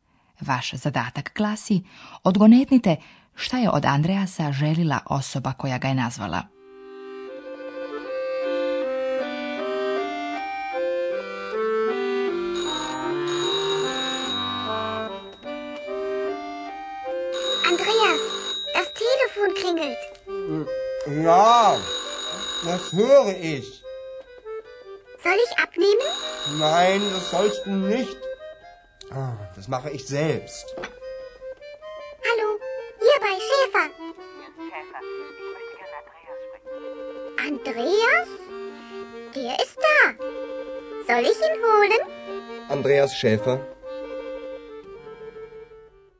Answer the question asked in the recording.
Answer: Osoba koja je nazvala Andreasa želi s njim porazgovarati.